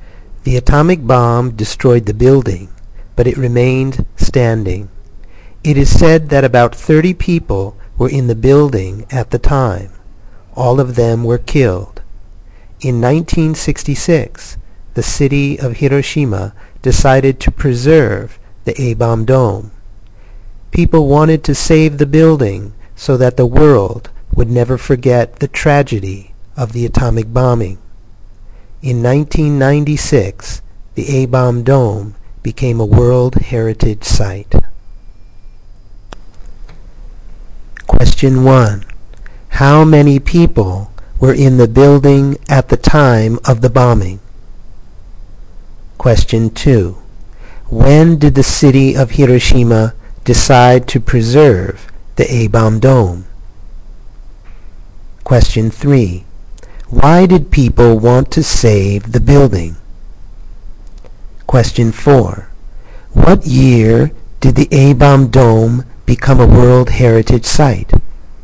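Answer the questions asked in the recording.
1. About 30 people
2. In 1966
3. So that the world would never forget the tragedy of the atomic bombing
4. 1996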